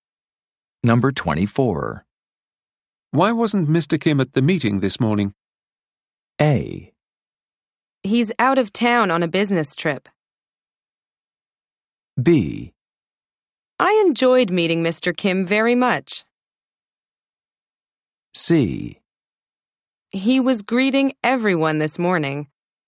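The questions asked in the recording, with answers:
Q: Why wasn't Mr. Kim at the meeting this morning?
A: A: He's out of town on a business trip.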